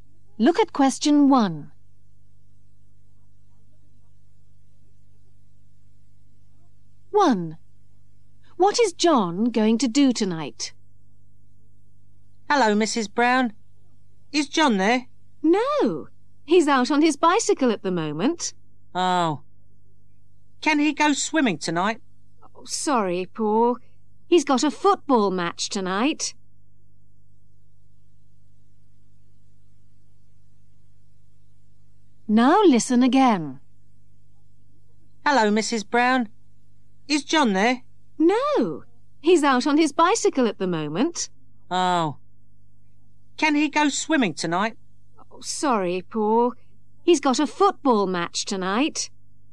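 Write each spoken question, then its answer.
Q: What is John going to do tonight?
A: Play in a football match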